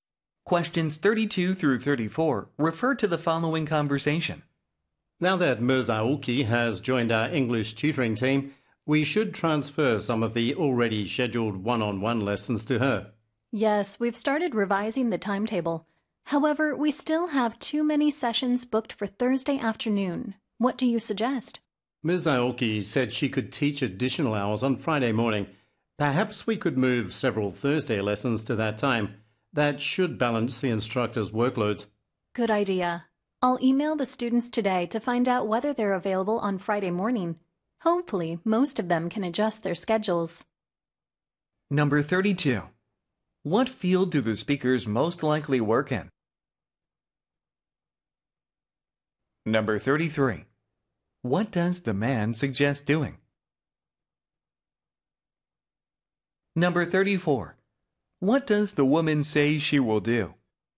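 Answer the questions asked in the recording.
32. English tutoring (education)
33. Moving several Thursday lessons to Friday morning
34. Email the students to check whether they're available on Friday morning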